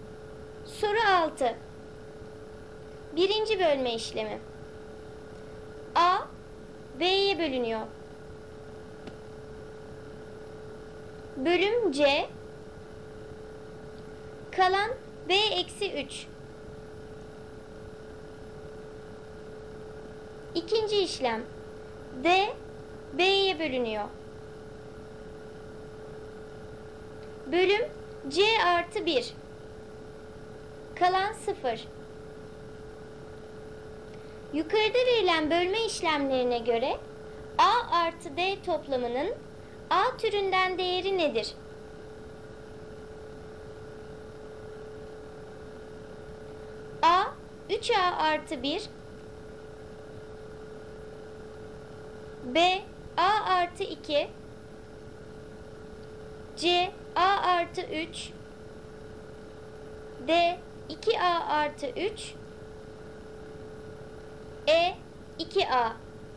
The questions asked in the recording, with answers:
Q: Yukarıda verilen bölme işlemlerine göre A artı D toplamının A türünden değeri nedir?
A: Doğru cevap D 2A artı 3.